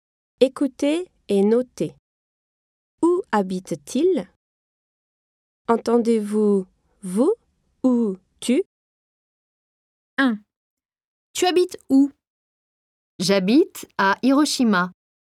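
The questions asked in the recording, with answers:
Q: Où habite-t-il? Entendez-vous vous ou tu?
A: À Hiroshima ; tu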